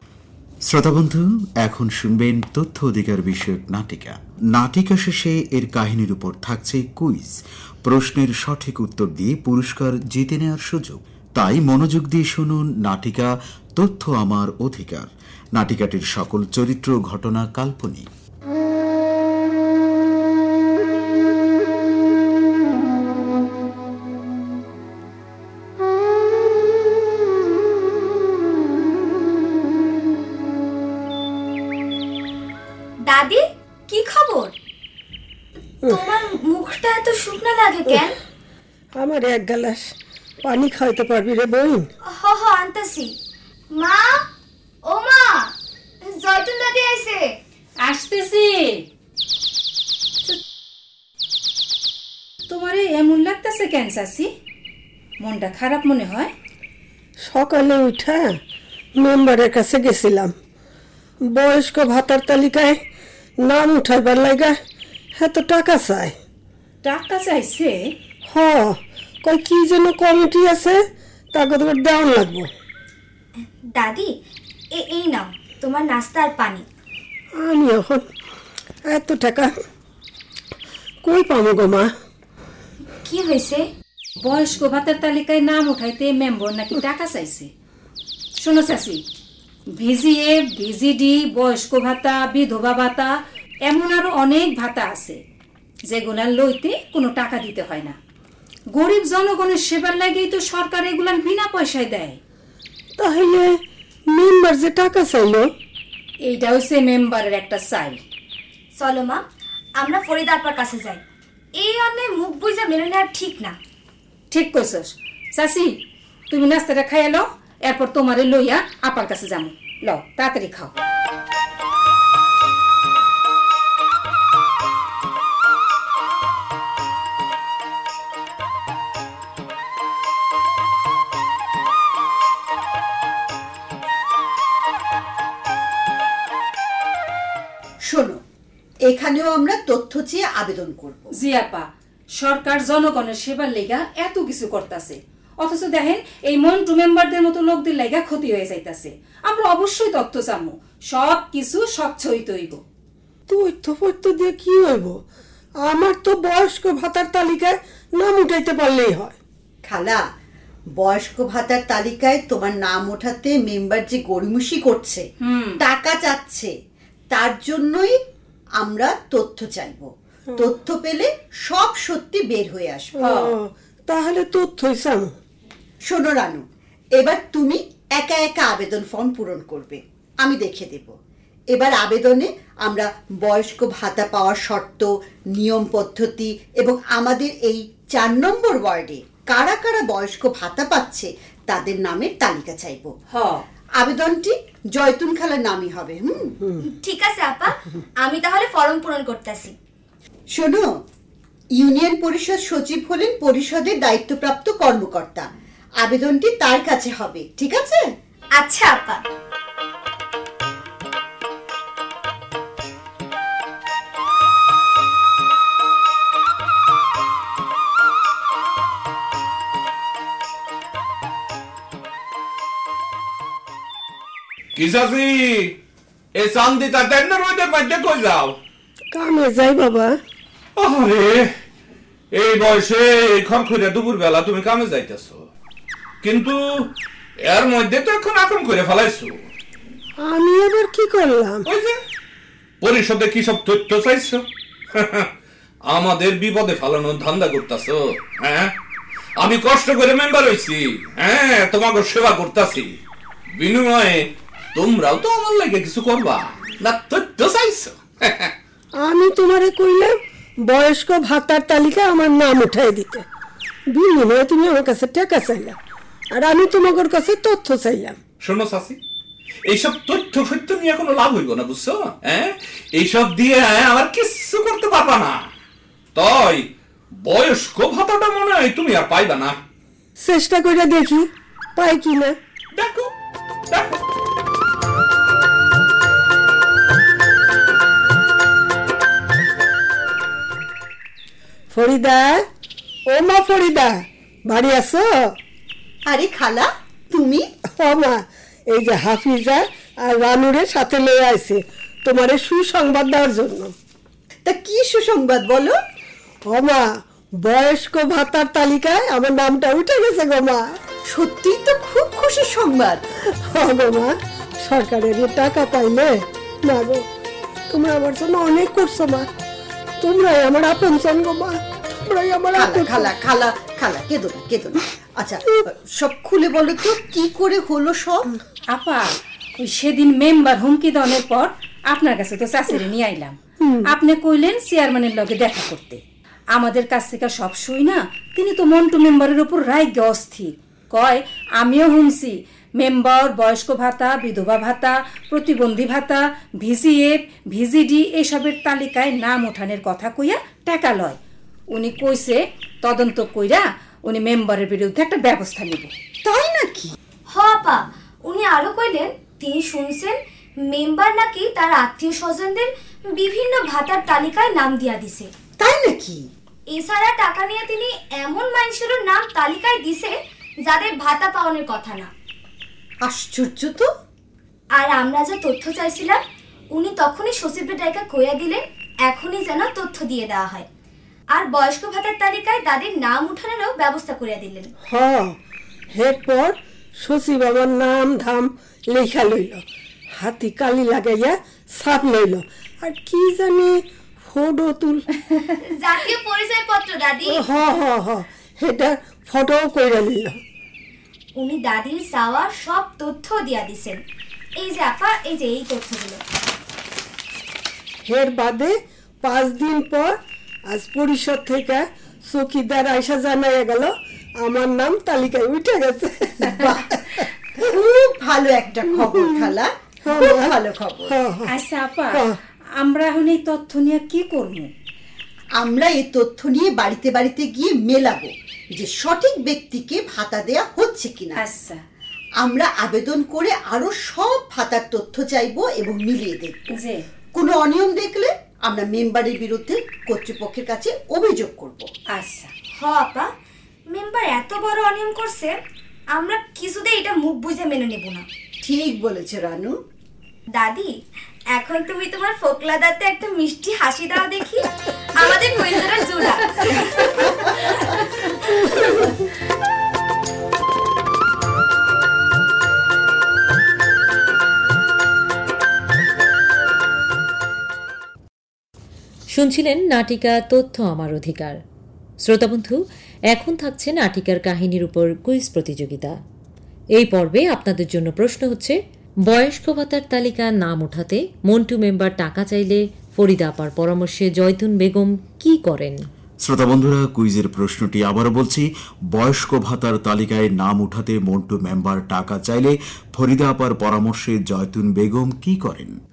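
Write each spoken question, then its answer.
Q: বয়স্ক ভাতার তালিকা নাম ওঠাতে মন্টু member টাকা চাইলে ফরিদা আপার পরামর্শে জয়তুন বেগম কি করেন?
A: union পরিষদ সচিবের কাছে তথ্য চেয়ে আবেদন করেন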